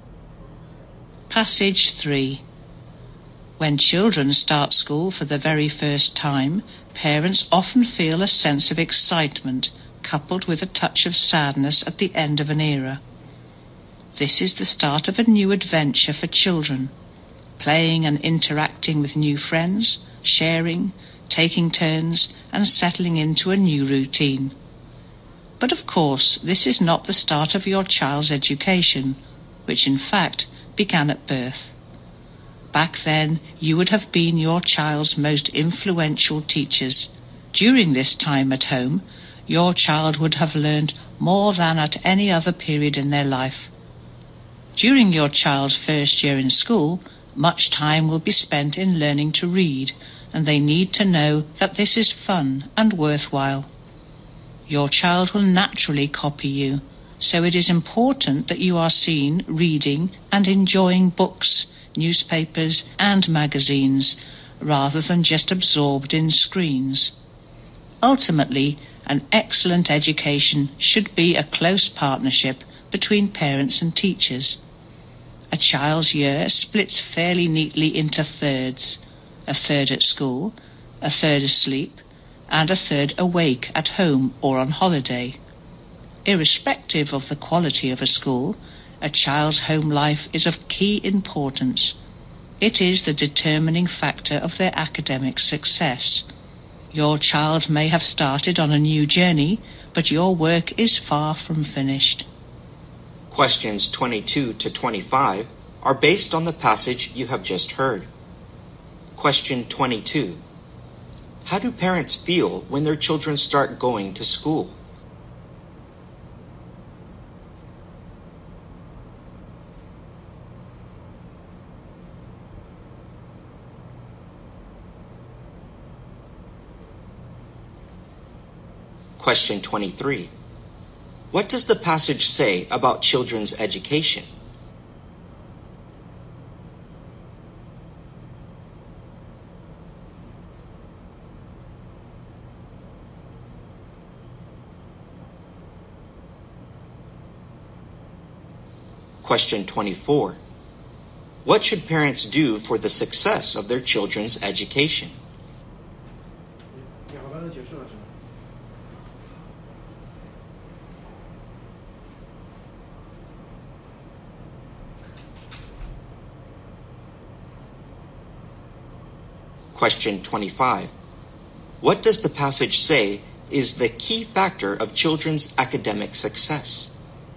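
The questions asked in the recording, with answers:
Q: How do parents feel when their children start going to school?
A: Excited, with a touch of sadness

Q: What does the passage say about children's education?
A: It begins at birth

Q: What does the passage say is the key factor of children's academic success?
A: The child's home life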